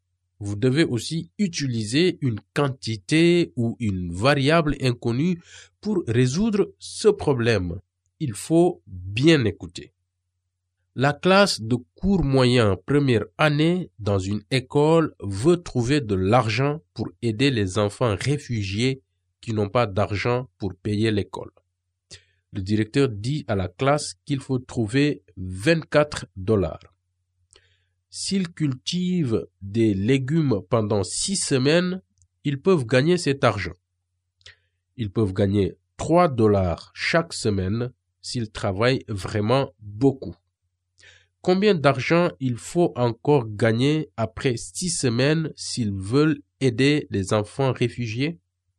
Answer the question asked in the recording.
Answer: On doit gagner 6 dollars de plus pour aider les enfants réfugiés.